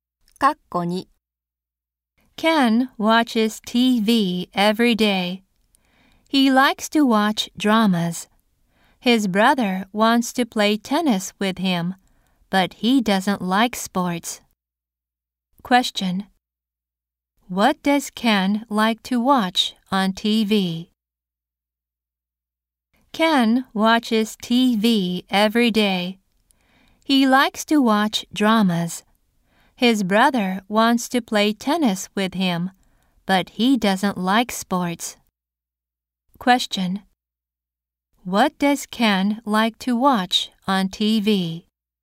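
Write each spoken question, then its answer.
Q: What does Ken like to watch on TV?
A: Dramas.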